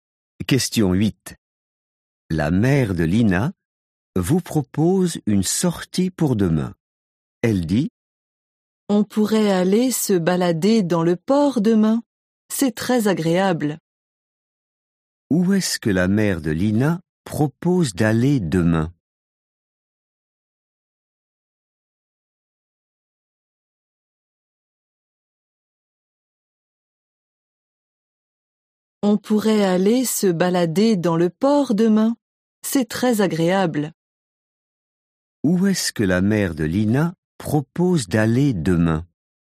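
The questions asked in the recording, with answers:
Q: Où est-ce que la mère de Lina propose d'aller demain?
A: au port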